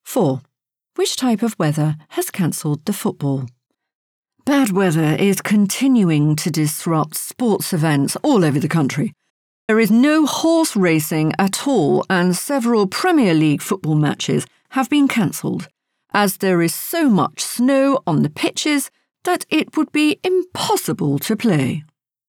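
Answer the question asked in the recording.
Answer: Snow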